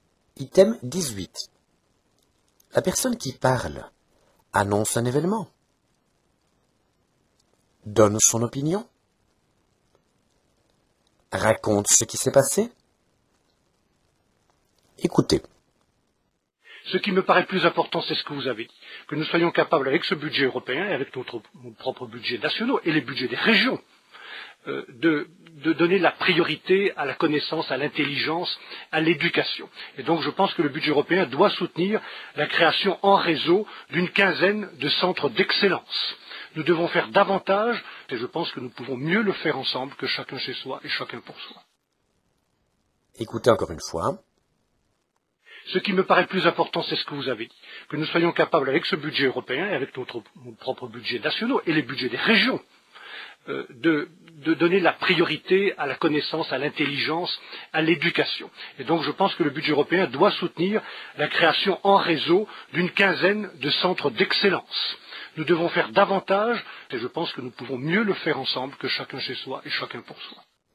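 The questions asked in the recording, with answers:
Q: La personne qui parle annonce un événement, donne son opinion, raconte ce qui s'est passé.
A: donne son opinion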